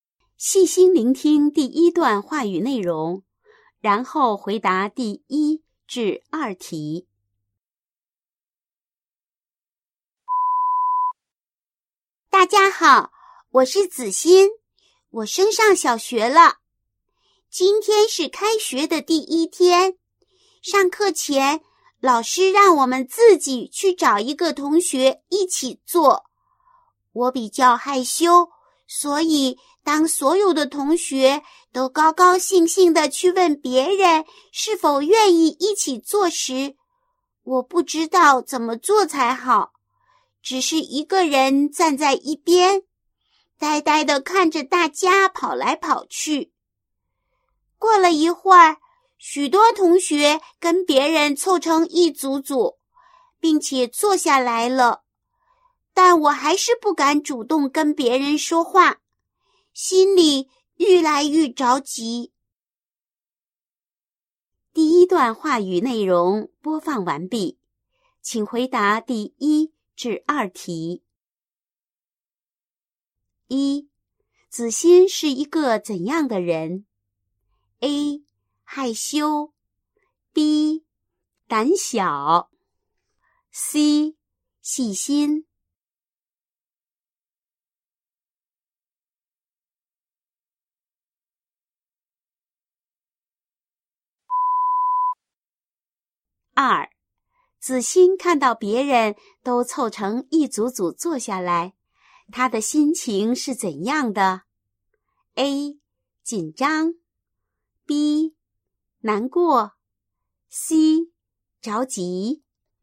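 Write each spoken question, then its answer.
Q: 子欣是一个怎样的人?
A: A: 害羞

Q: 子欣看到别人都凑成一组组坐下来,他的心情是怎样的?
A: C: 着急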